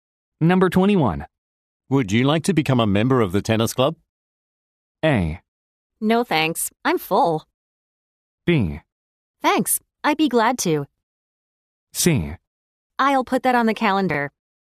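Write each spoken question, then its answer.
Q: Would you like to become a member of the tennis club?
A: B: Thanks, I'd be glad to.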